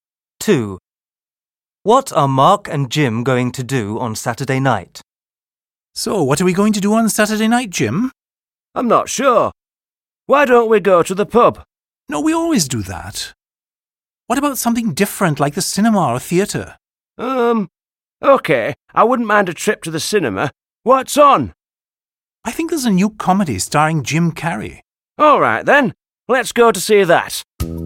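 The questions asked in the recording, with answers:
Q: What are Mark and Jim going to do on Saturday night?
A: Go to the cinema to see a comedy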